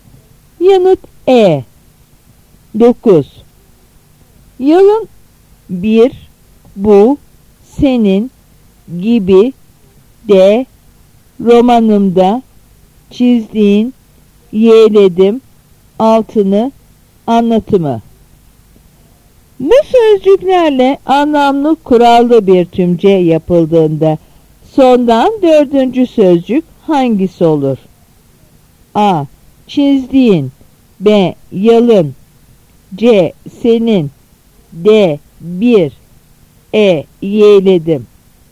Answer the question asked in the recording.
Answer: Yanıt B.